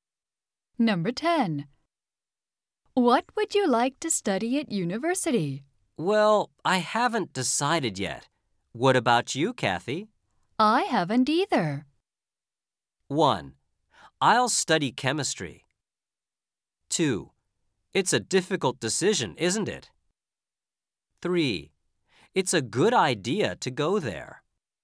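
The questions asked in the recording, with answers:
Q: I haven't either.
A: 2: It's a difficult decision, isn't it?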